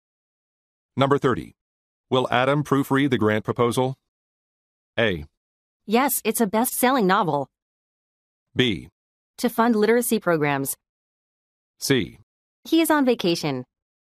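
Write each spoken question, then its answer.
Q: Will Adam proofread the grant proposal?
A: C: He is on vacation.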